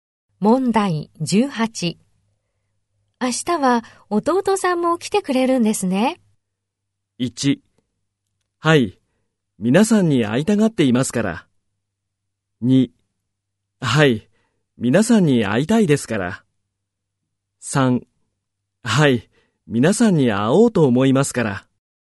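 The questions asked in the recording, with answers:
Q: 明日は弟さんも来てくれるんですね。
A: 2: はい、皆さんに会いたがっていますから。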